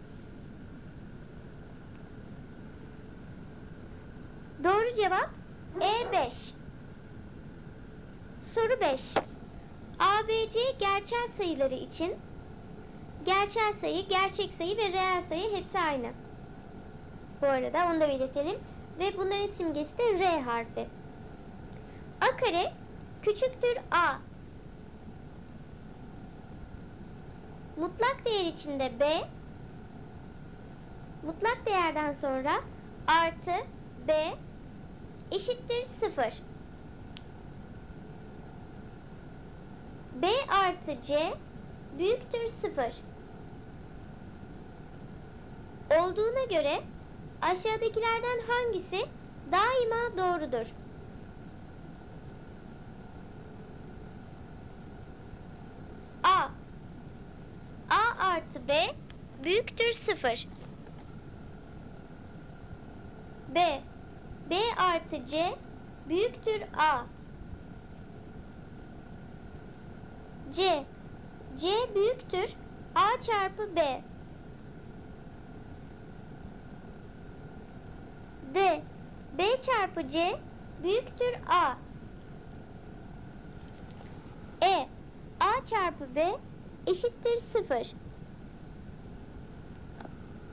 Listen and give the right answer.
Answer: Doğru cevap C seçeneği. C büyüktür A çarpı B.